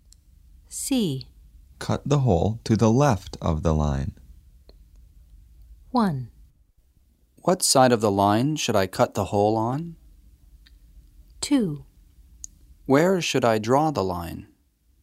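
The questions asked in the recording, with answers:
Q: Cut the hole to the left of the line.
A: 1: What side of the line should I cut the hole on?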